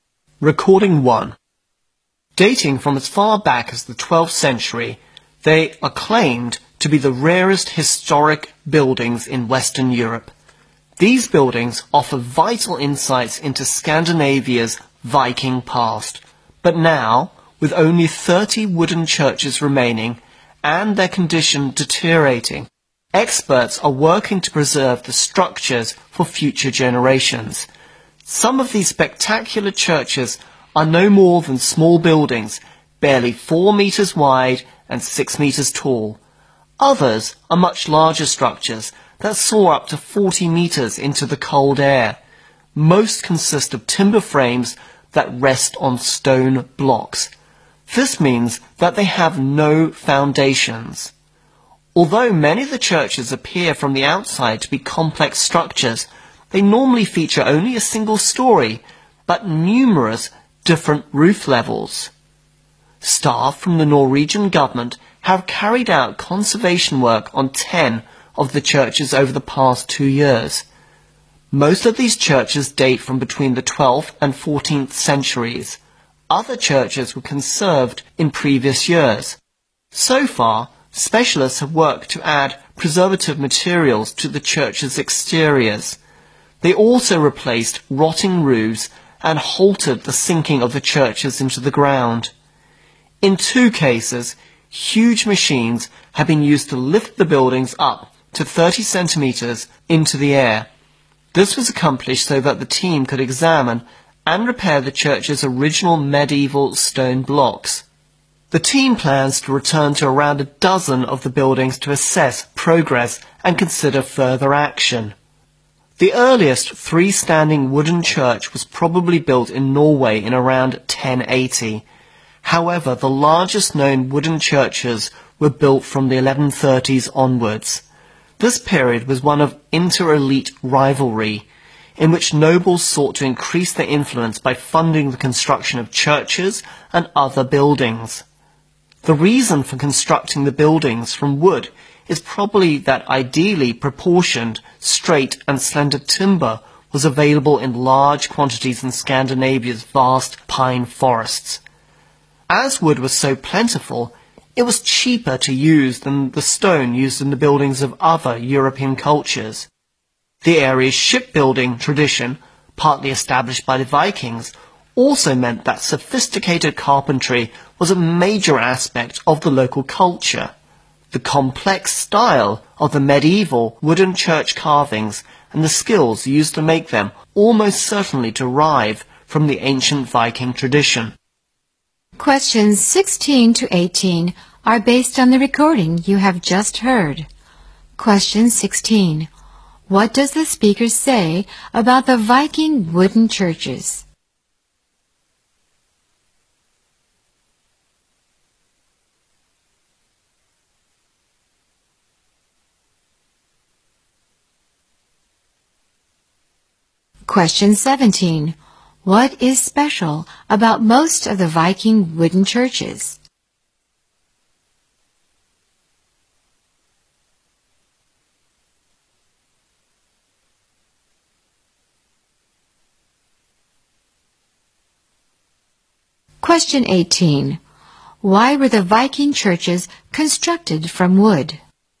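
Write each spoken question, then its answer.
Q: What does the speaker say about the Viking wooden churches?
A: They are the rarest historic buildings in Western Europe, and only 30 remain, deteriorating

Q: What is special about most of the Viking wooden churches?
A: They have no foundations; timber frames rest on stone blocks

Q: Why were the Viking churches constructed from wood?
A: Suitable timber was plentiful and cheaper than stone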